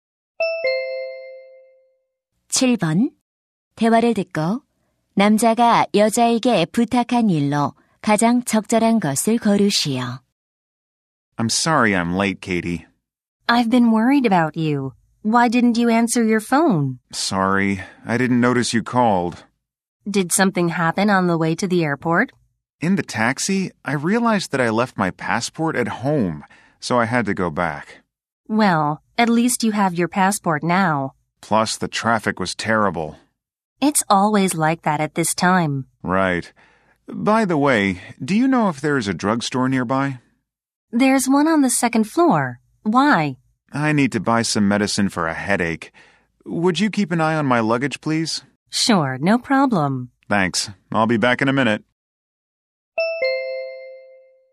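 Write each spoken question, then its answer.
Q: 대화를 듣고 남자가 여자에게 부탁한 일로 가장 적절한 것을 고르시오.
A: 짐 봐 주기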